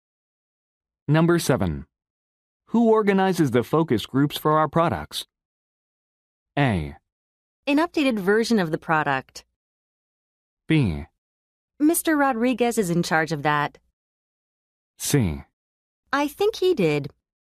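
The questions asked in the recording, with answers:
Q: Who organizes the focus groups for our products?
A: B: Mr. Rodriguez is in charge of that.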